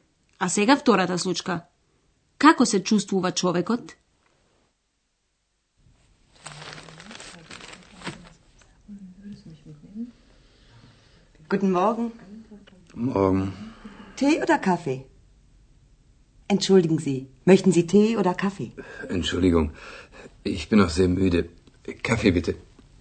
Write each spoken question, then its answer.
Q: Како се чувствува човекот?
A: Беше толку уморен што воопшто не слушна кога го праша дали сака чај или кафе.